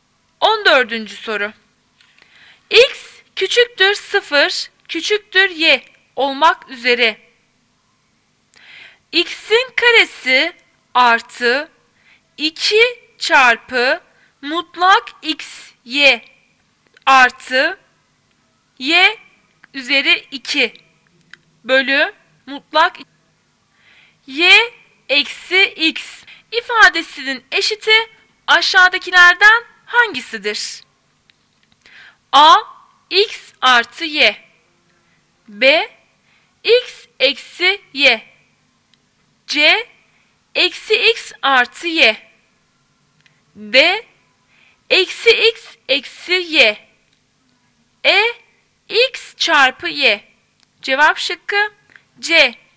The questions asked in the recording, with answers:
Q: X'in karesi artı 2 çarpı mutlak x y artı y üzeri 2 bölü mutlak y eksi x ifadesinin eşiti aşağıdakilerden hangisidir?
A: Cevap şıkkı C.